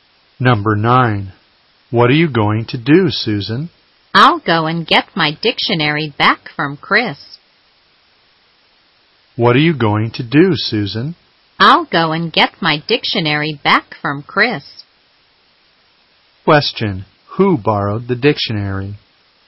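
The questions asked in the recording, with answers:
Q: Who borrowed the dictionary?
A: Chris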